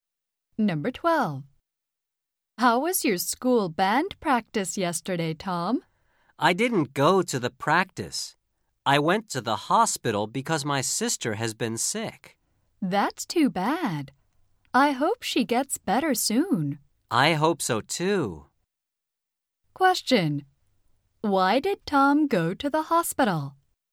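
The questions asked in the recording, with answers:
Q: Why did Tom go to the hospital?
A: Because his sister has been sick.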